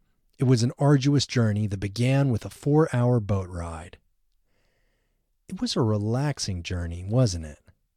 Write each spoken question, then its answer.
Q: It was a relaxing journey, wasn't it?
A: No, it wasn't a relaxing journey.